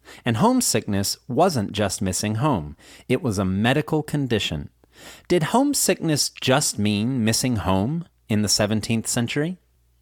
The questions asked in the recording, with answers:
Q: Did homesickness just mean missing home in the 17th century?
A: No. Homesickness didn't just mean missing home in the 17th century.